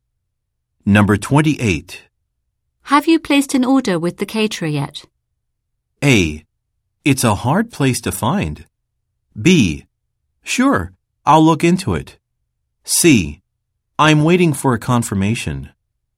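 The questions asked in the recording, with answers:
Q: Have you placed an order with the caterer yet?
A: C: I'm waiting for a confirmation.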